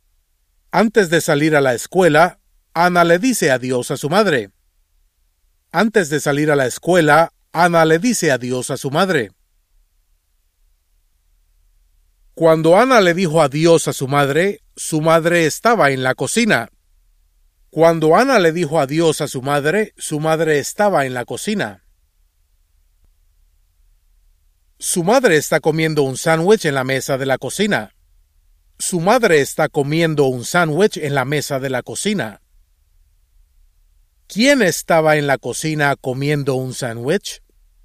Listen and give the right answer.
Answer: La madre de Ana estaba en la cocina comiendo un sándwich.